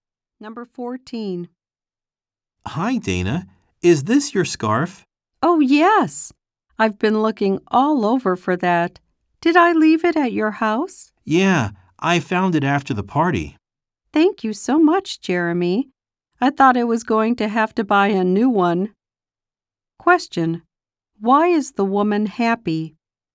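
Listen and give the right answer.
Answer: Jeremy found her scarf.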